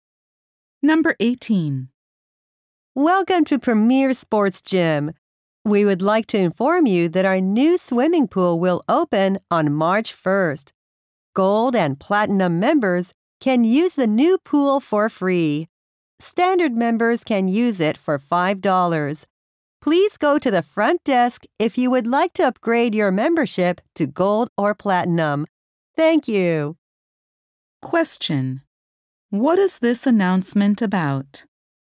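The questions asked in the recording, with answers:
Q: What is this announcement about?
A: The gym's new swimming pool.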